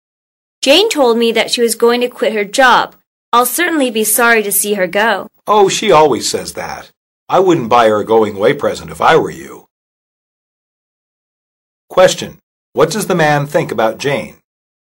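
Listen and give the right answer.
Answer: She won't really quit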